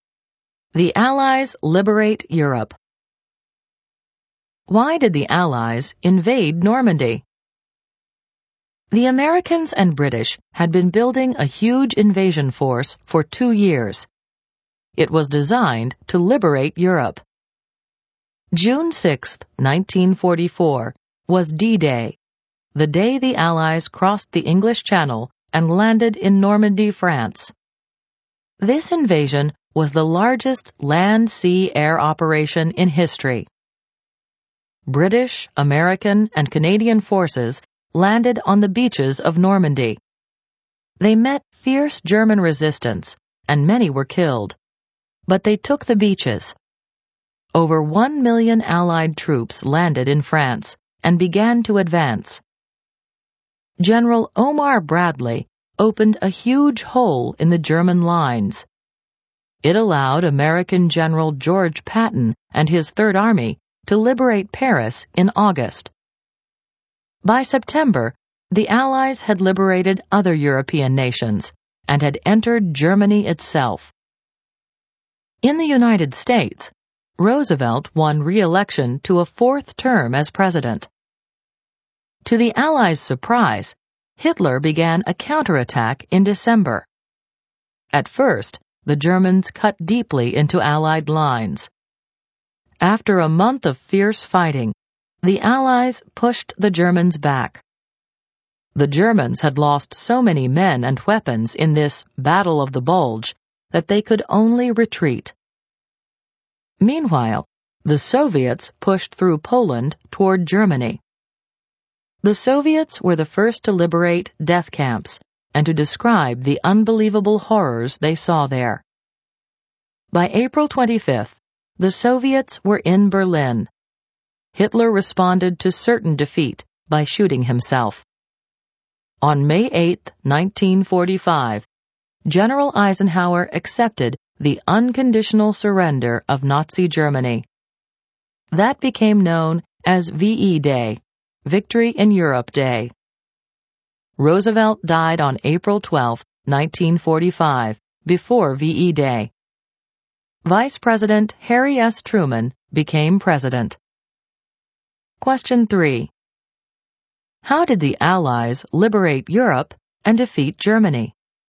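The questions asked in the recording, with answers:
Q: How did the Allies liberate Europe and defeat Germany?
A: They invaded Normandy on D-Day, liberated Paris and other nations, defeated Germany in the Battle of the Bulge, and the Soviets pushed into Berlin, leading to Germany's unconditional surrender on May 8, 1945.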